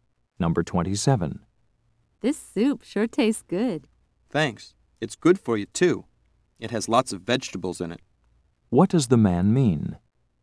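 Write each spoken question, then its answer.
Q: What does the man mean?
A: The soup is healthy.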